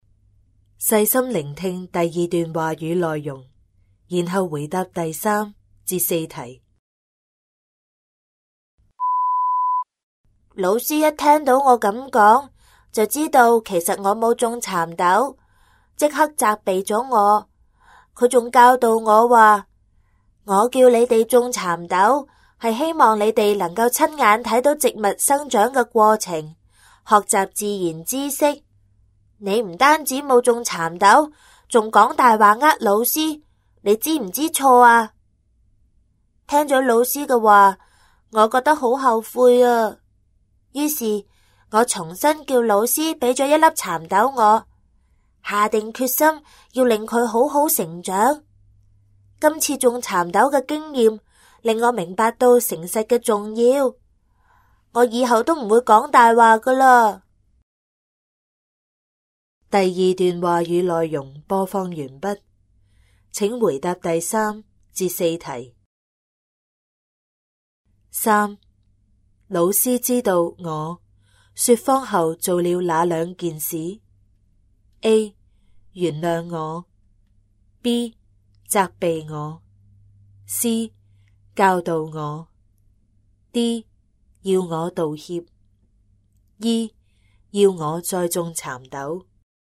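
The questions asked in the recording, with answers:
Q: 老师知道我说谎后做了哪两件事? A. 原谅我, B. 责备我, C. 教导我, D. 要我道歉, E. 要我再种蚕豆。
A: B: 责备我; C: 教导我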